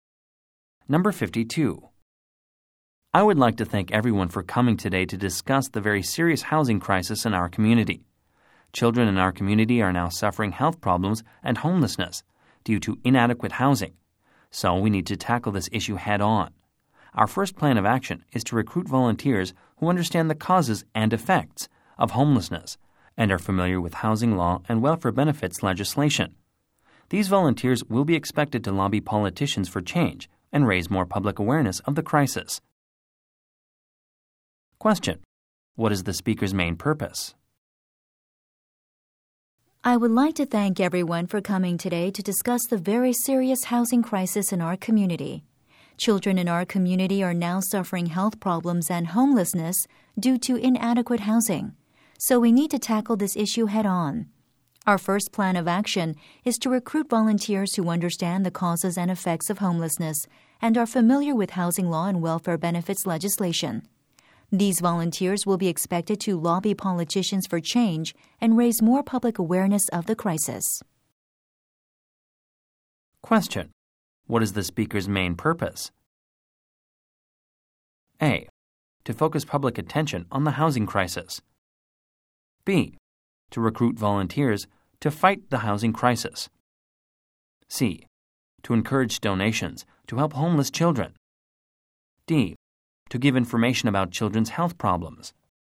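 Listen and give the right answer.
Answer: B: To recruit volunteers to fight the housing crisis.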